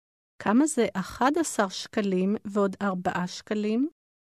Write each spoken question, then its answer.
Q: כמה זה 11 שקלים ועוד 4 שקלים?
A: 15 שקלים.